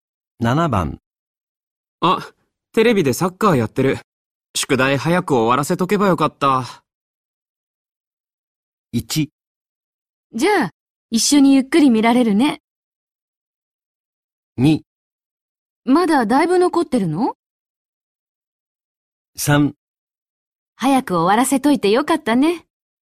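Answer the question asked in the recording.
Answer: 2: まだだいぶ残ってるの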